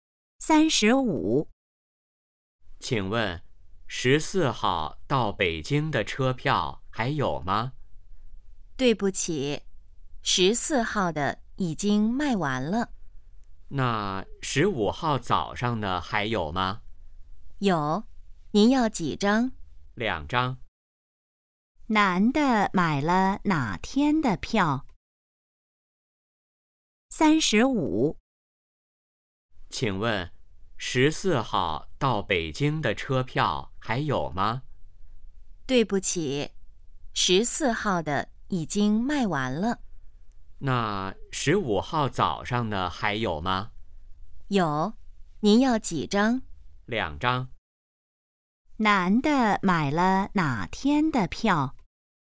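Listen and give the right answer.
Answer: 15号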